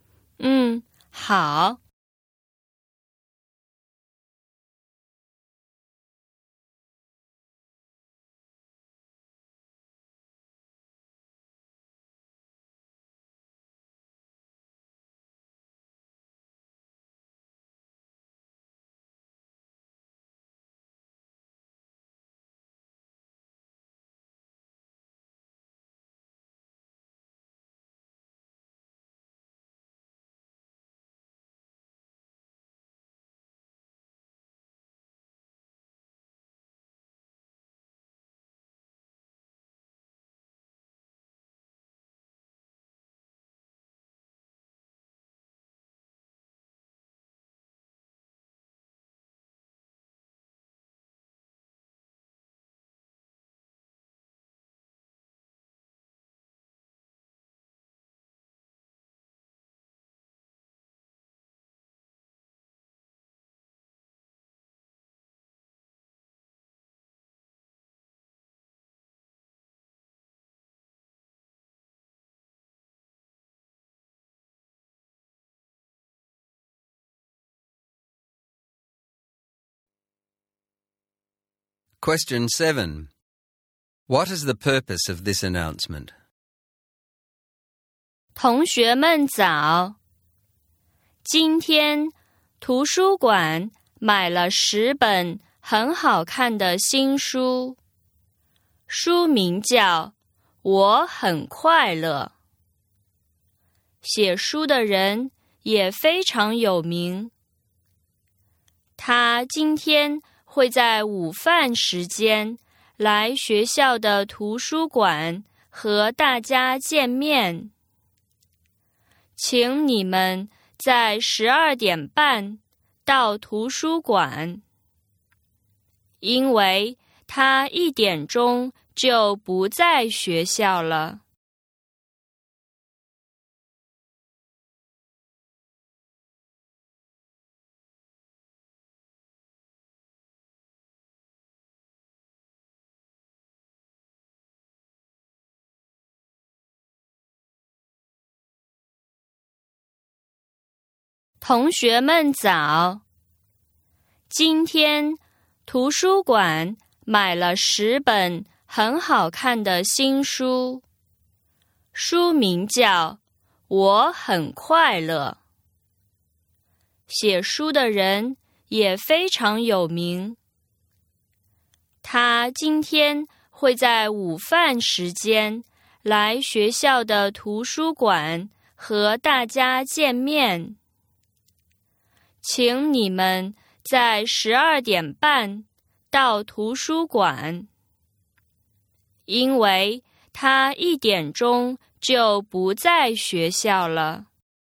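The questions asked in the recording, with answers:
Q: What is the purpose of this announcement?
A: To invite students to the library at 12:30 to meet the famous author of the new book 《我很快乐》, who is visiting at lunchtime and will leave at 1:00.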